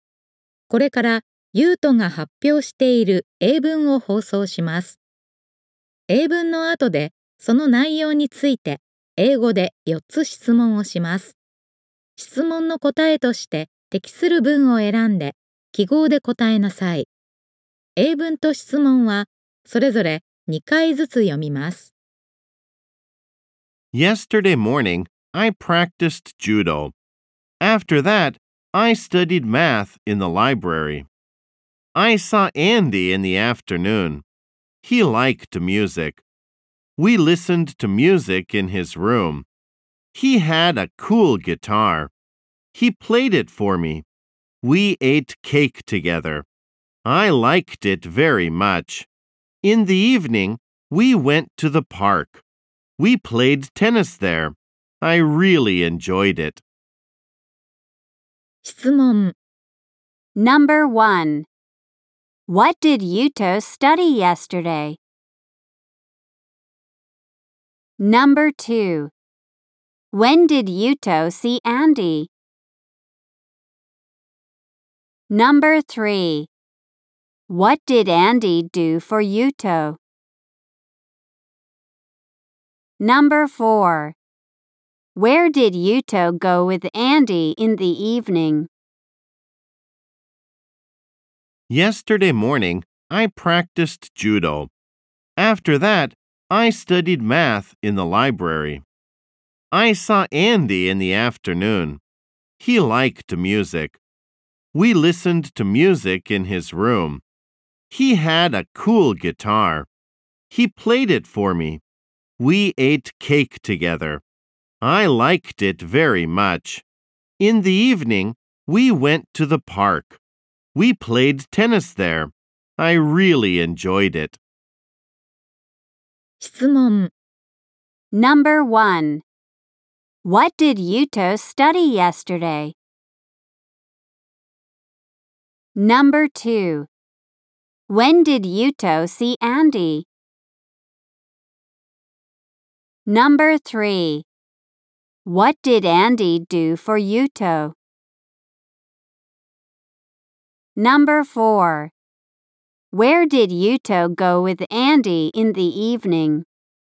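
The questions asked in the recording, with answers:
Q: What did Yuto study yesterday?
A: Math

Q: When did Yuto see Andy?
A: In the afternoon

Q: What did Andy do for Yuto?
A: He played the guitar for him

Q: Where did Yuto go with Andy in the evening?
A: To the park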